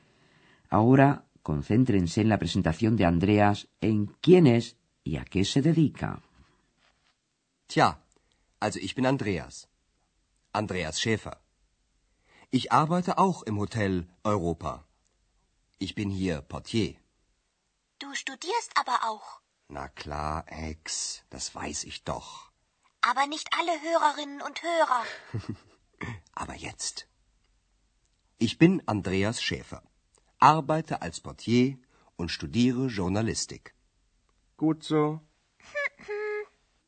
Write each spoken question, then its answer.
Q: Ahora concéntrense en la presentación de Andreas, en quién es y a qué se dedica.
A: Como habrán podido oír, también Andreas trabaja en el Hotel Europa.